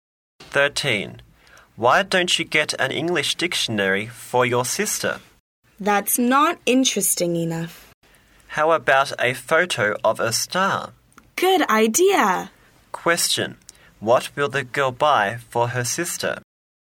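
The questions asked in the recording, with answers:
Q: What will the girl buy for her sister?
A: A photo of a star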